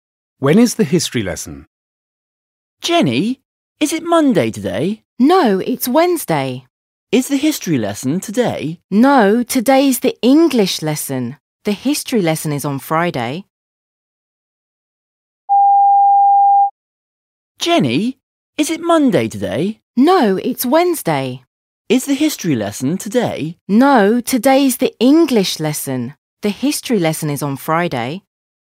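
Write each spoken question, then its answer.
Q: When is the history lesson?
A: On Friday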